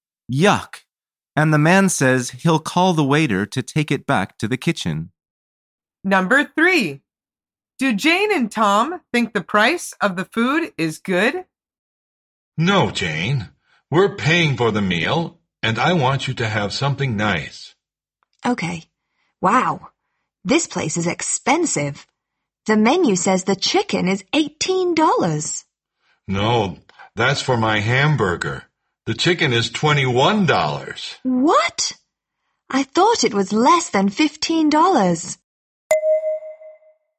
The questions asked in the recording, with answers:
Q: Do Jane and Tom think the price of the food is good?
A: The answer is no. They think it costs a lot.